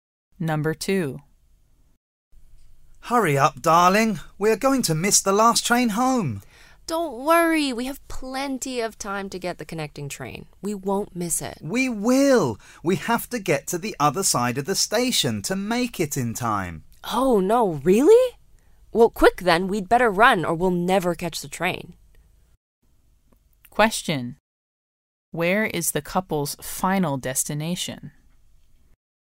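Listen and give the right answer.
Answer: Home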